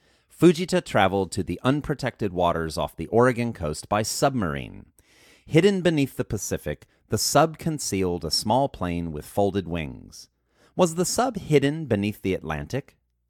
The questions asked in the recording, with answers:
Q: Was the sub hidden beneath the Atlantic?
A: No, the sub wasn't hidden beneath the Atlantic.